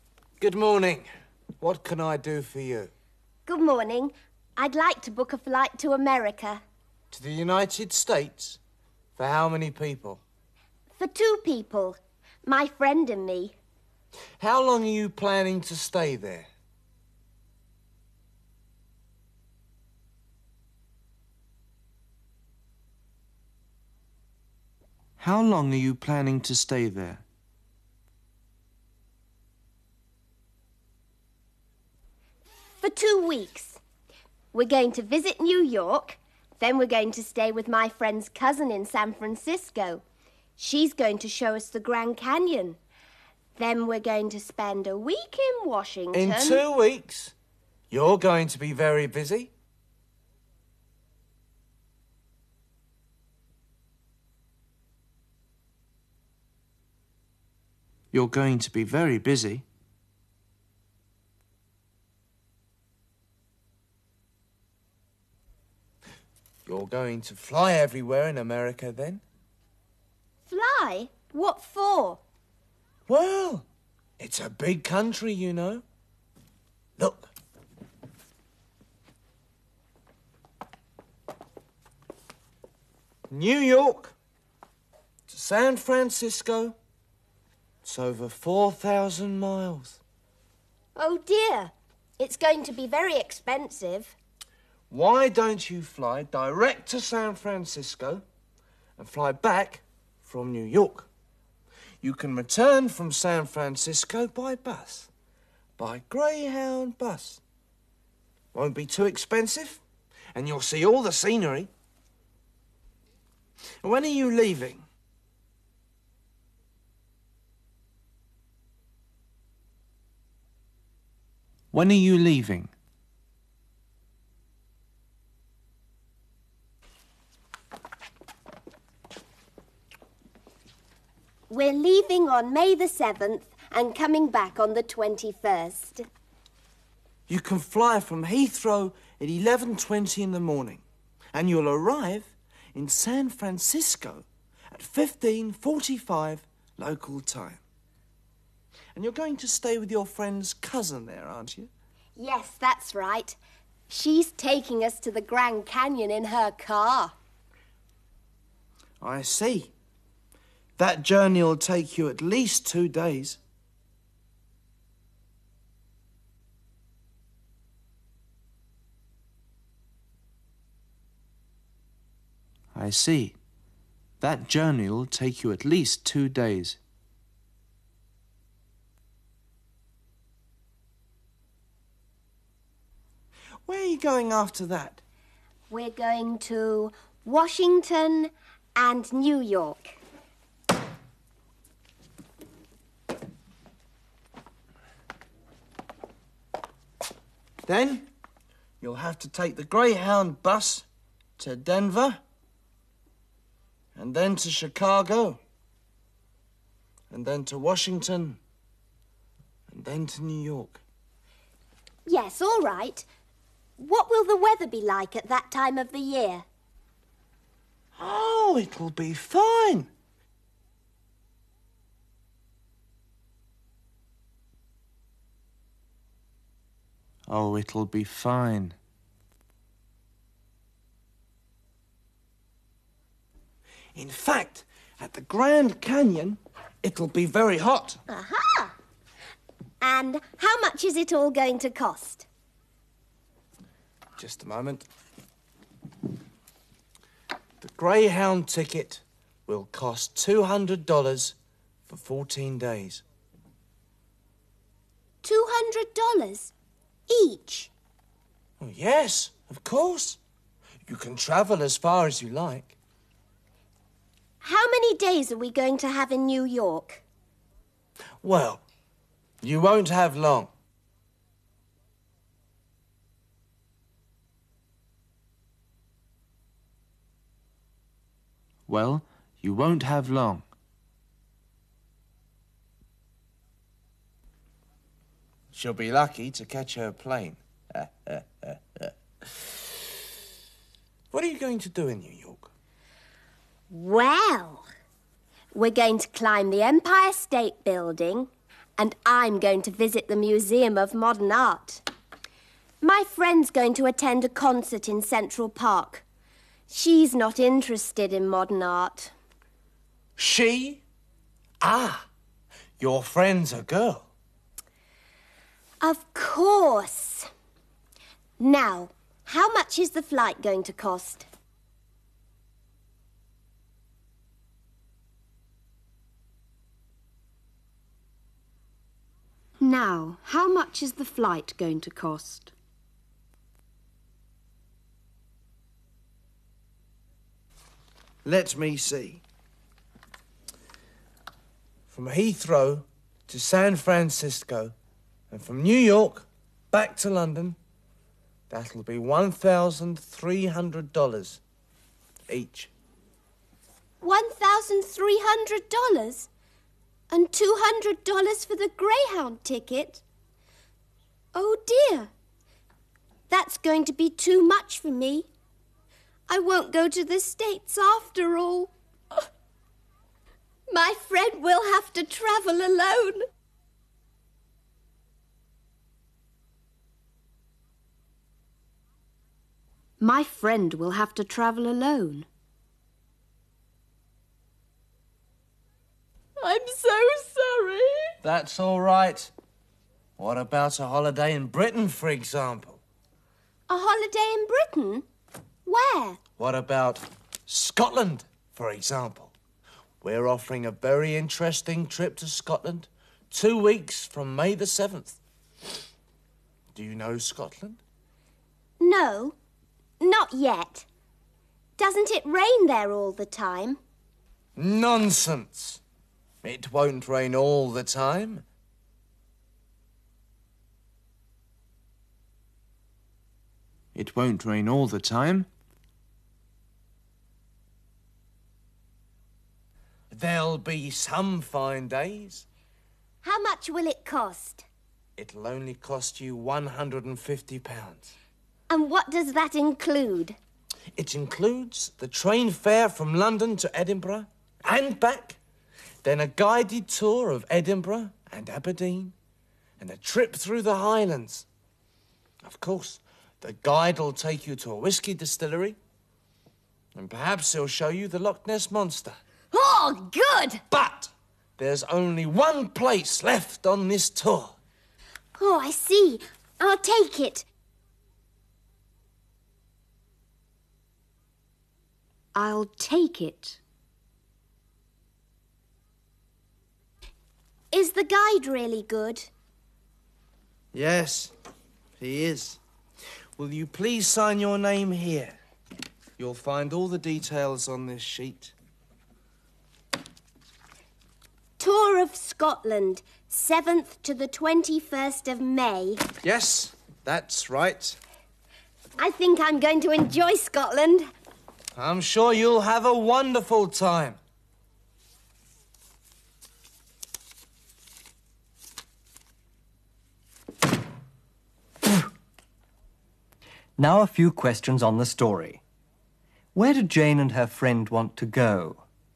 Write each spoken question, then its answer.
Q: Where did Jane and her friend want to go?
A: They want to go to America.